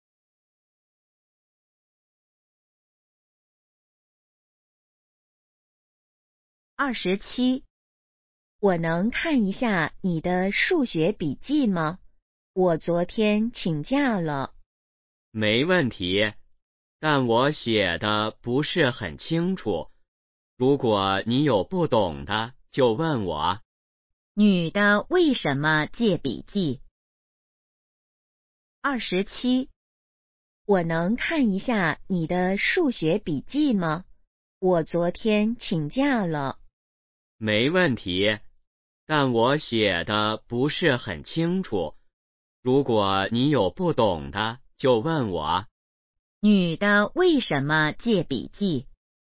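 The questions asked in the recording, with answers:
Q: 女的为什么借笔记?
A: 她昨天请假了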